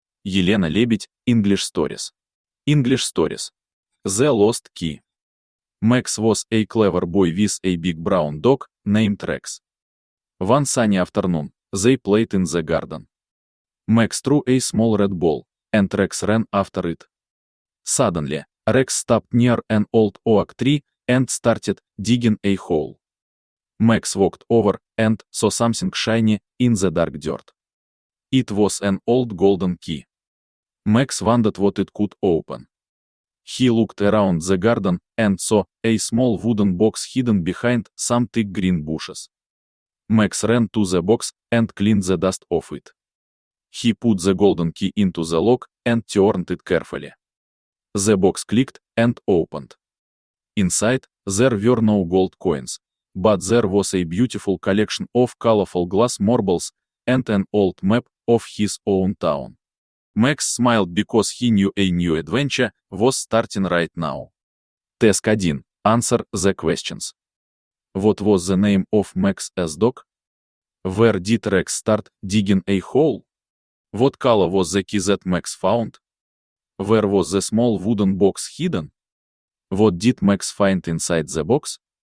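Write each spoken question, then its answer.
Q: What was the name of Max's dog?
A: Rex

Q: Where did Rex start digging a hole?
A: Near an old oak tree

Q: What color was the key that Max found?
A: Golden

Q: Where was the small wooden box hidden?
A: Behind some thick green bushes

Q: What did Max find inside the box?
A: Colorful glass marbles and an old map of his town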